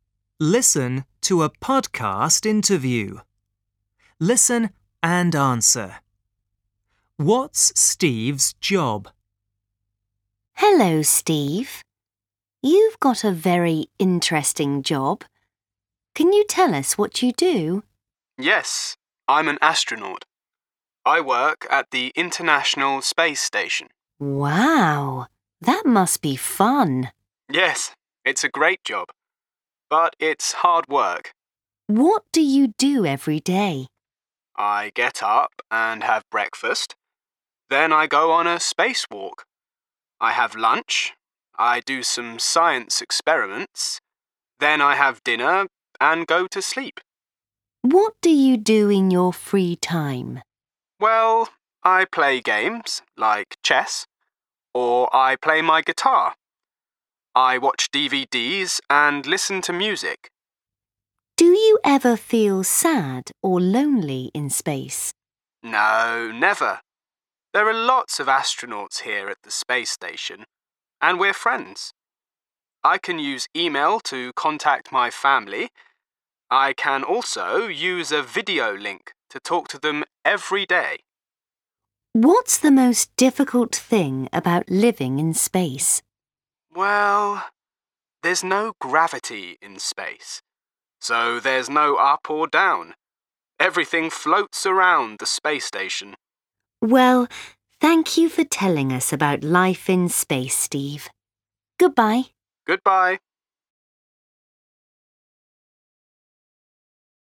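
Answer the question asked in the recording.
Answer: He's an astronaut.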